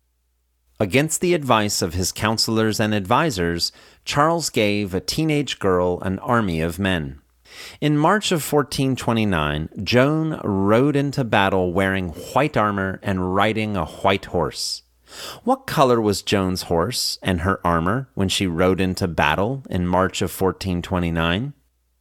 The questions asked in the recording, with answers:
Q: What color was Joan's horse and her armor when she rode into battle in March of 1429?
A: In March of 1429, Joan rode into battle wearing white armor and riding a white horse.